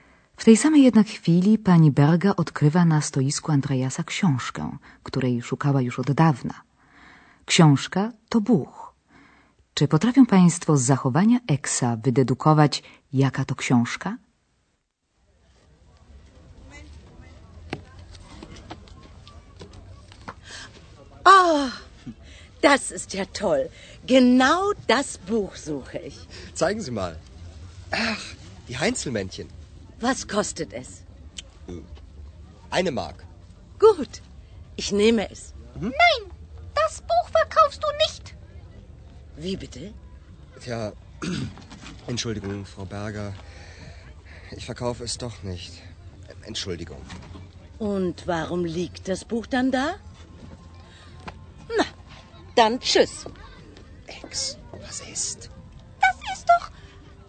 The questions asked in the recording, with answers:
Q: Czy potrafią Państwo z zachowania Eksa wydedukować, jaka to książka?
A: była to książka o kolońskich krasnoludkach Heinzelmännchen, z kart której Eks wskoczył w życie Andreasa.